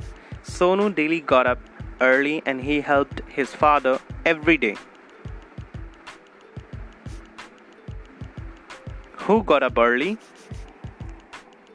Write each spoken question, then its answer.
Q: Who got up early?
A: Sonu. Sonu got up early daily.